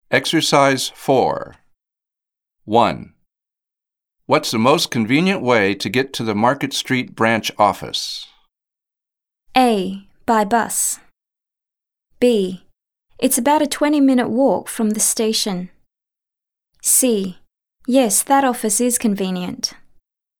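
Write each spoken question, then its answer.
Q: What's the most convenient way to get to the Market Street branch office?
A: A: By bus.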